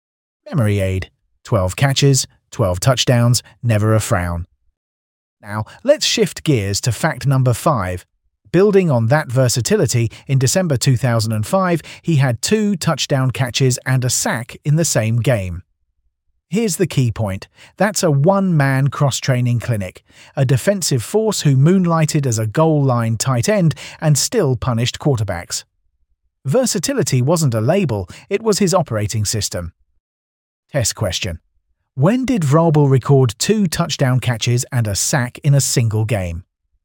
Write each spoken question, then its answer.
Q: When did Vrabel record 2 touchdown catches and a sack in a single game?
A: Correct answer, December 2005.